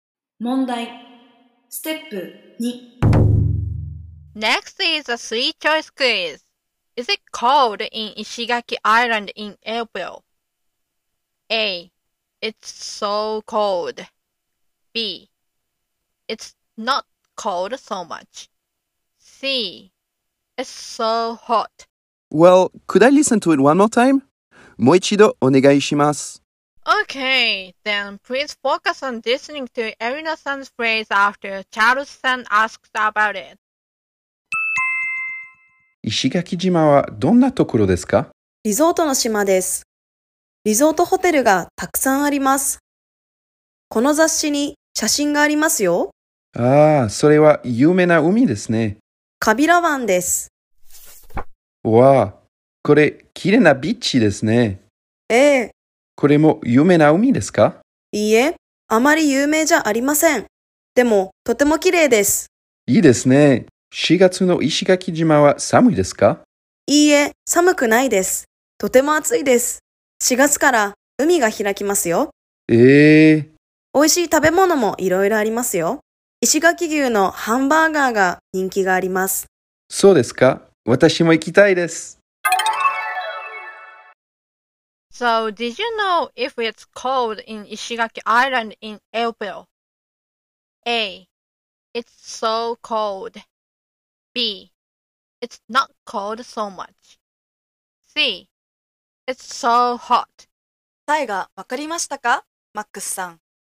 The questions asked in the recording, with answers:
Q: So did you know if it's cold in Ishigaki Island in April?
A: So the answer is C.